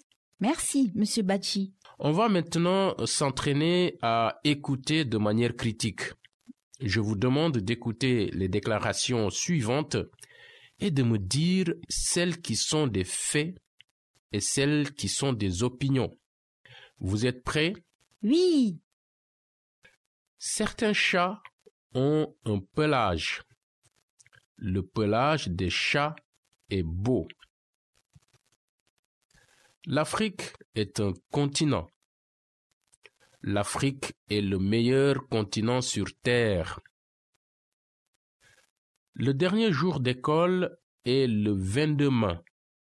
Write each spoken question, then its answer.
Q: Certains chats ont un pelage.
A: C'est un fait.

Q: Le pelage des chats est beau.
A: Opinion?

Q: L'Afrique est un continent.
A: C'est un fait?

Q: L'Afrique est le meilleur continent sur Terre.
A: c'est une opinion

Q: Le dernier jour d'école est le 22 mai.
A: la déclaration « Le dernier jour d'école est le 22 mai » est un fait.